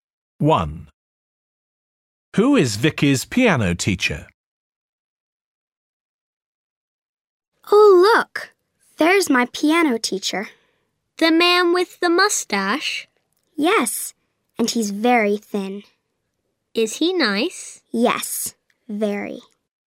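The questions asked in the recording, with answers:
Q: Who is Vicky's piano teacher?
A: The thin man with the mustache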